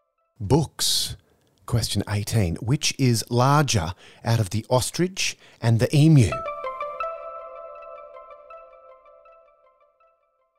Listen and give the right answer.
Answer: the ostrich.